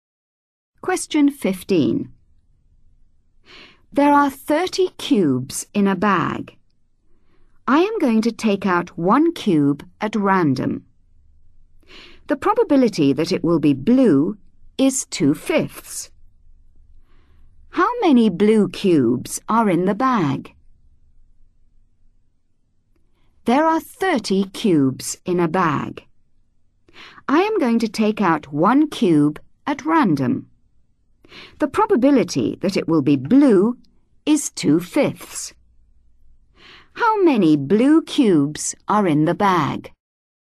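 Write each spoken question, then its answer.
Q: How many blue cubes are in the bag?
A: 12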